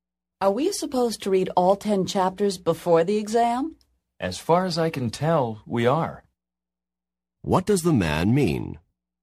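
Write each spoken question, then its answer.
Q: What does the man mean?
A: He thinks they have to read all 10 chapters.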